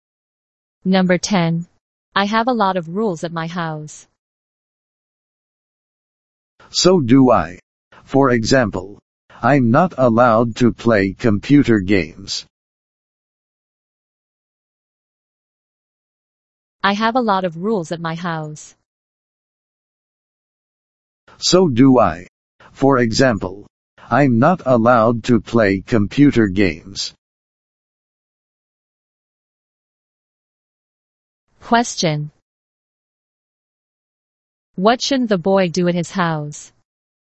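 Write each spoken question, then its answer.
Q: What shouldn't the boy do at his house?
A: Play computer games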